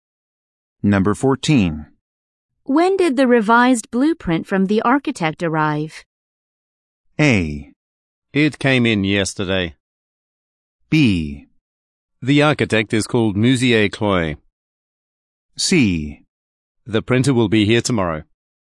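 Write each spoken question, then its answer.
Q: When did the revised blueprint from the architect arrive?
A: A: It came in yesterday.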